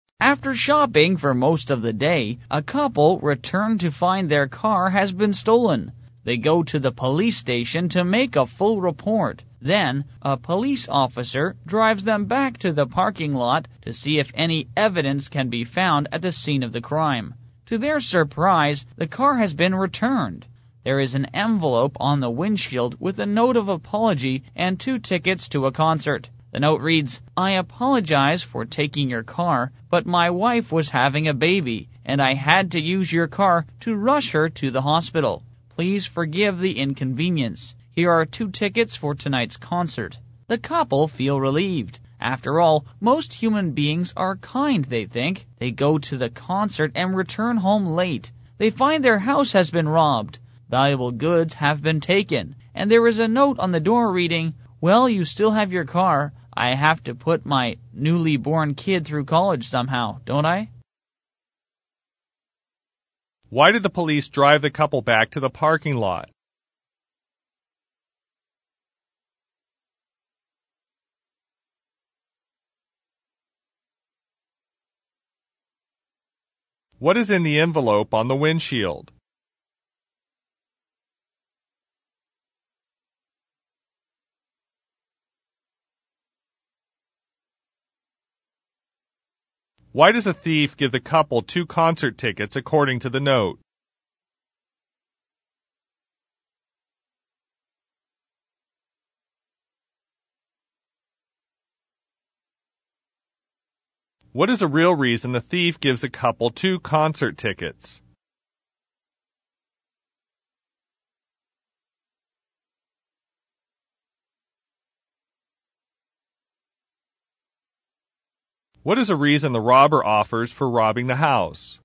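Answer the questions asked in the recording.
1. To see if any evidence could be found at the scene of the crime
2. A note of apology and two concert tickets
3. To apologize for taking their car to rush his wife to the hospital
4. To get them out of the house so he could rob it
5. To pay for his newborn child's college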